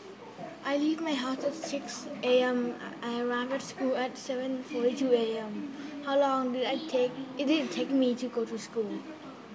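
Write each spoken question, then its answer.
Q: How long did I take?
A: 1 hour 42 minutes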